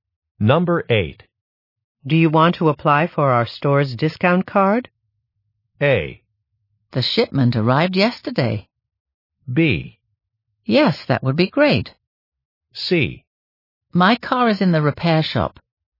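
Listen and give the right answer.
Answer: B: Yes, that would be great.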